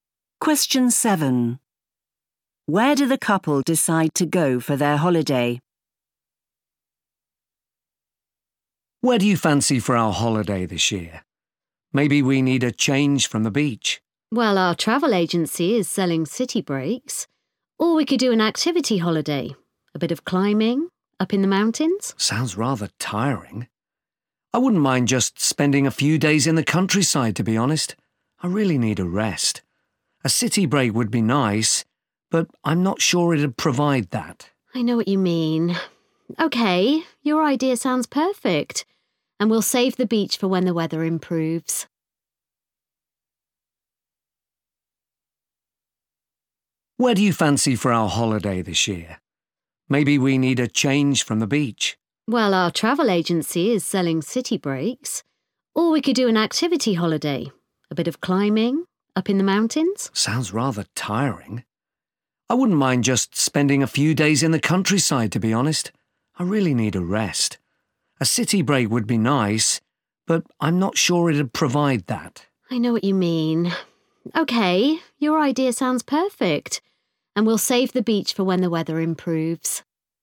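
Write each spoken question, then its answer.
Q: Where do the couple decide to go for their holiday?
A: the countryside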